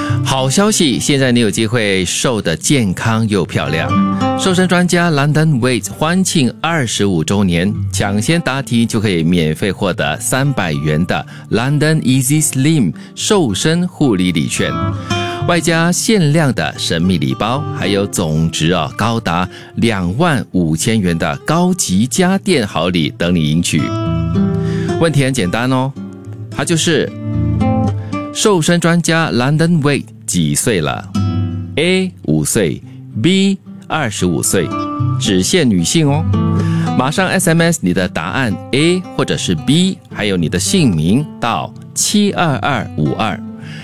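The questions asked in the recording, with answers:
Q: 问题很简单哦,它就是瘦身专家 London Weight 几岁了?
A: B: 25岁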